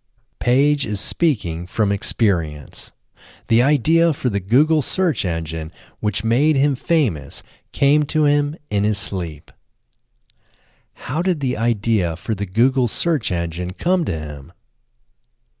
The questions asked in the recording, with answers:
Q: how did the idea for the Google search engine come to him?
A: The idea for the Google search engine came to him in his sleep.